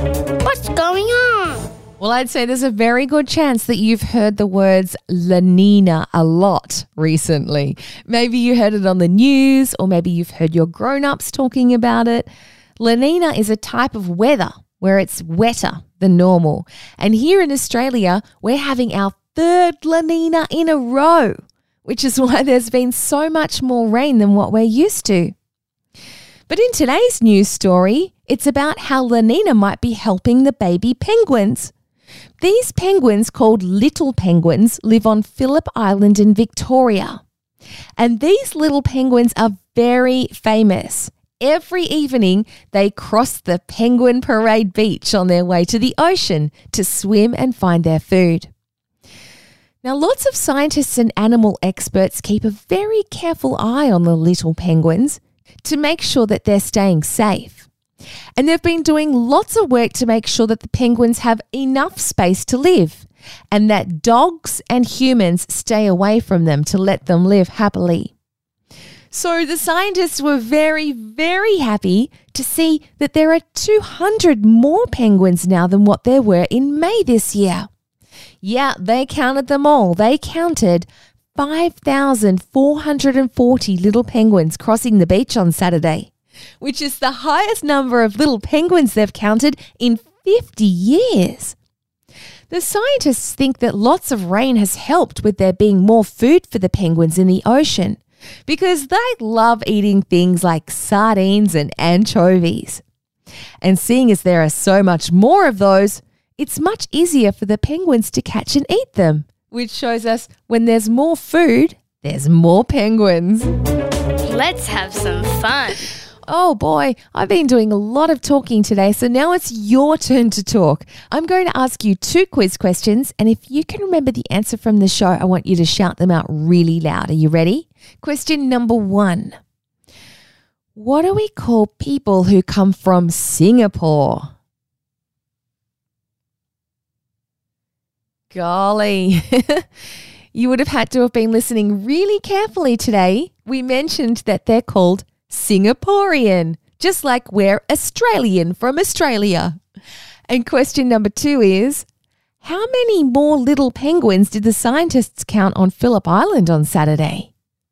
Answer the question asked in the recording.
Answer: There were about 200 more penguins.